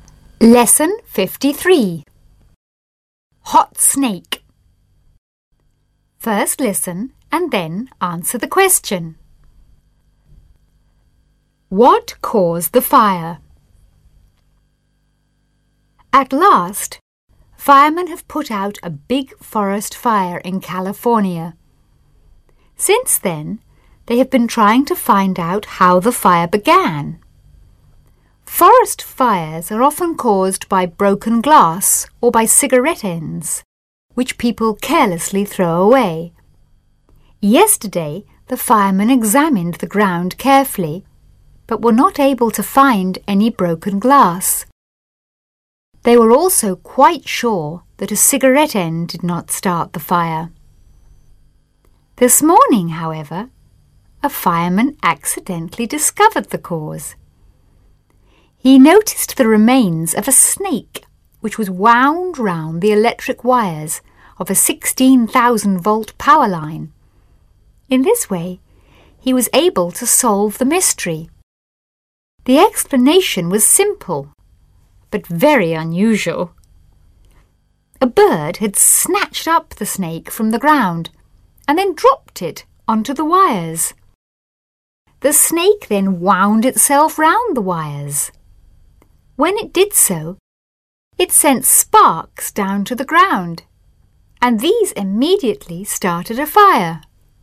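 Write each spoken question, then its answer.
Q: What caused the fire?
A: A snake dropped by a bird onto electric power wires, which sent sparks to the ground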